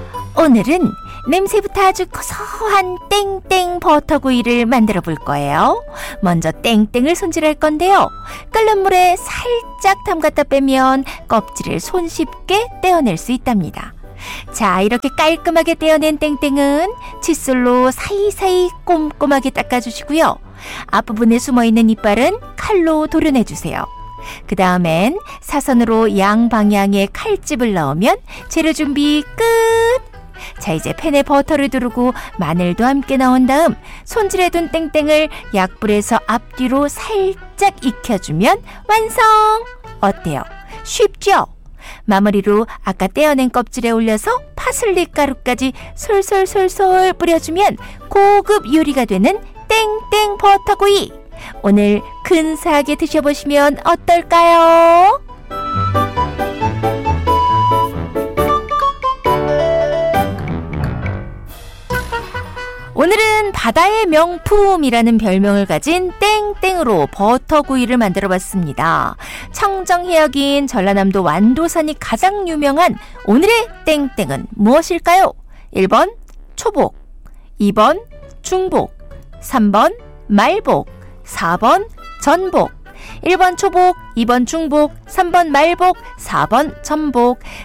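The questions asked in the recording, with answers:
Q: 청정해역인 전라남도 완도산이 가장 유명한 오늘의 땡땡은 무엇일까요?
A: 4번: 전복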